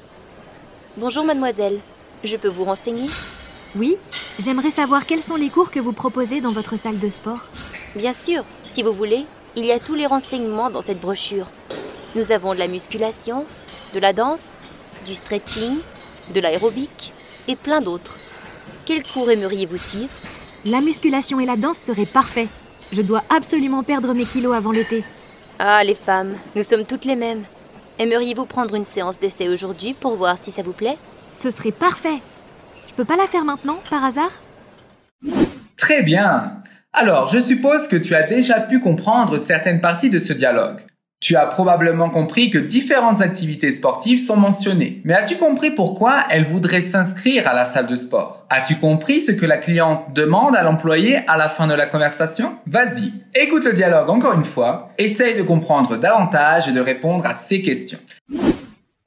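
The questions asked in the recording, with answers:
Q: Mais as-tu compris pourquoi elle voudrait s'inscrire à la salle de sport ?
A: Pour perdre ses kilos avant l'été

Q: As-tu compris ce que la cliente demande à l'employé à la fin de la conversation ?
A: Si elle peut faire la séance d'essai maintenant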